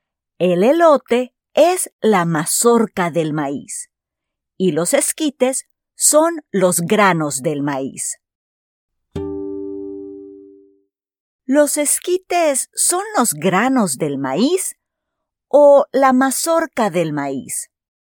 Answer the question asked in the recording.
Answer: Sí, los esquites son los granos del maíz.